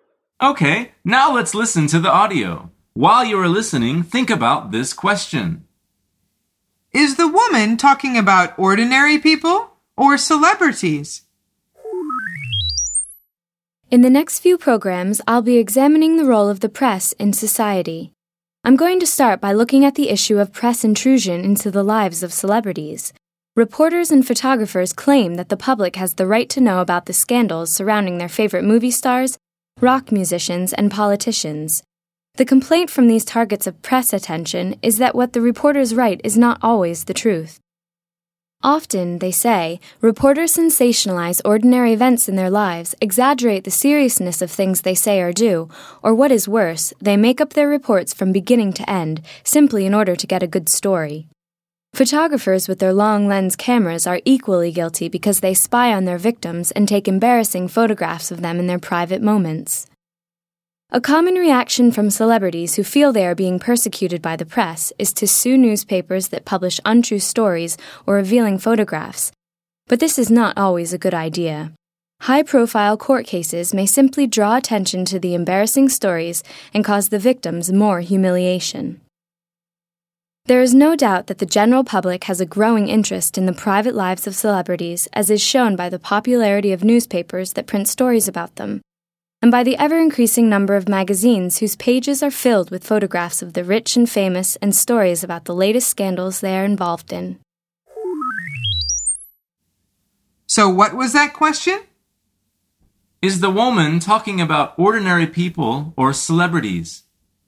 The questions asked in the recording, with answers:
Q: Is the woman talking about ordinary people or celebrities?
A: The answer is celebrities.